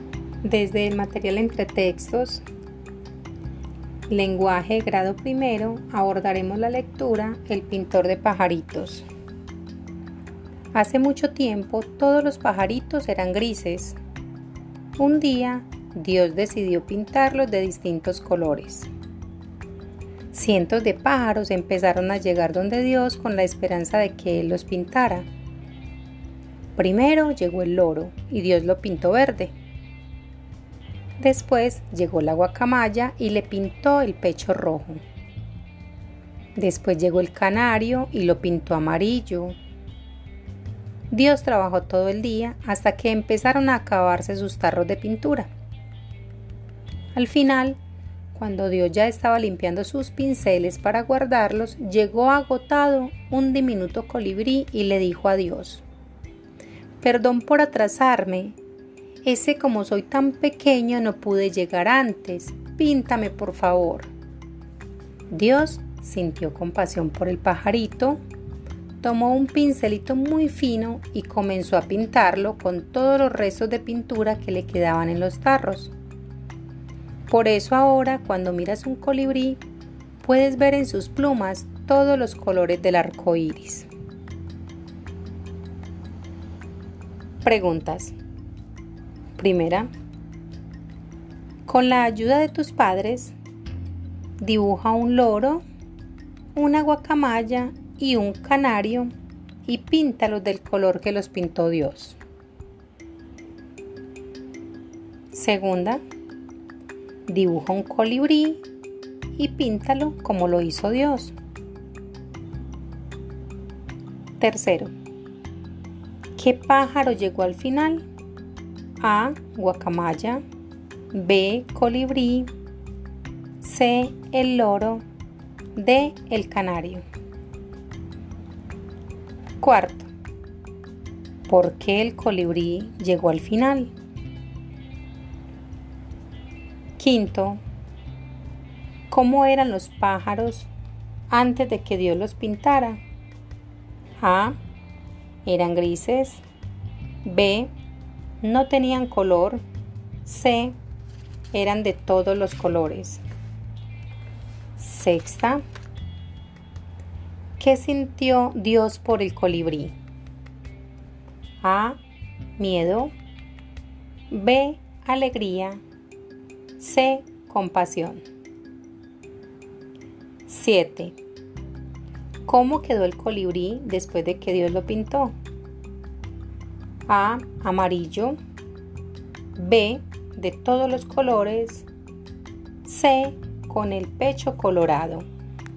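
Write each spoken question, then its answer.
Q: ¿qué pájaro llegó al final?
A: B: Colibrí

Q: ¿Por qué el colibrí llegó al final?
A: Porque era tan pequeño que no pudo llegar antes

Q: ¿Cómo eran los pájaros antes de que Dios los pintara?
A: A: Eran grises

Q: ¿qué sintió Dios por el colibrí?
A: C: compasión

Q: ¿Cómo quedó el colibrí después de que Dios lo pintó?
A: B: De todos los colores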